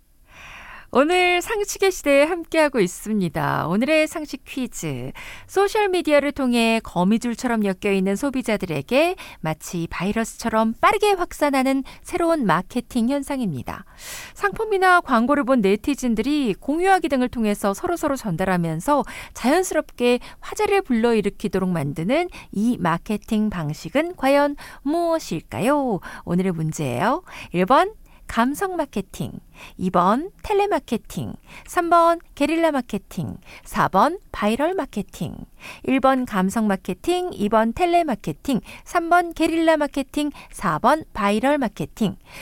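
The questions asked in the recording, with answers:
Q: 상품이나 광고를 본 네티즌들이 공유하기 등을 통해서 서로서로 전달하면서 자연스럽게 화제를 불러일으키도록 만드는 이 마케팅 방식은 과연 무엇일까요?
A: 4: 바이럴 마케팅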